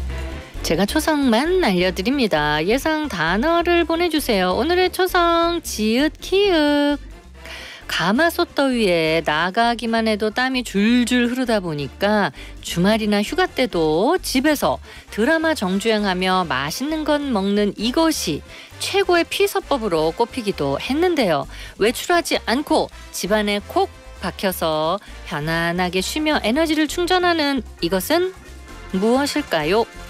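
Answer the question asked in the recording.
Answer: 집콕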